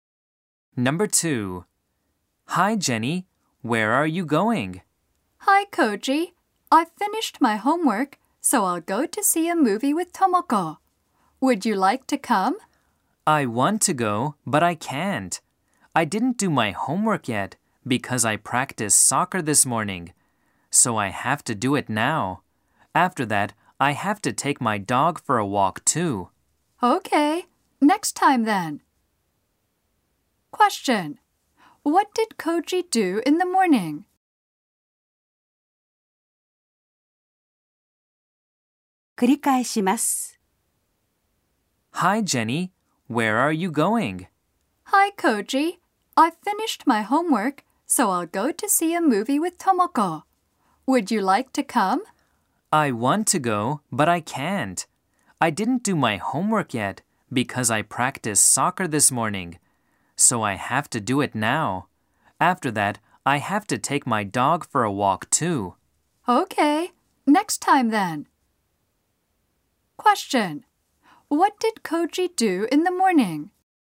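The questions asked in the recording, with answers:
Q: What did Koji do in the morning?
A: He practiced soccer.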